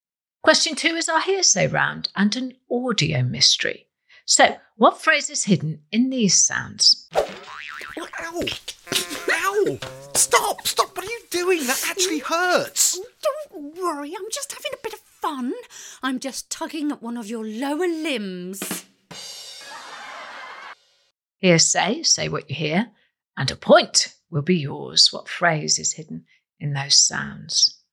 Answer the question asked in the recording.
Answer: Well, the answer hidden in that clip was pulling my leg or pulling your leg.